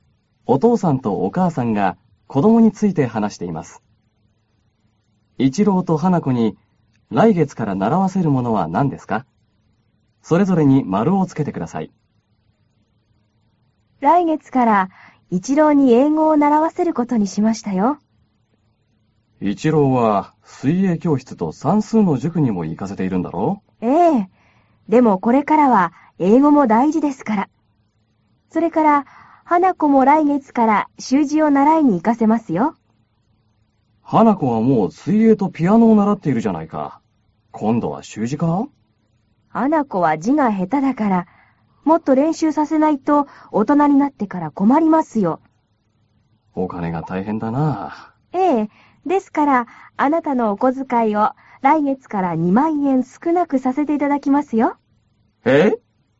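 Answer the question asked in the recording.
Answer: 一郎は英語、花子は習字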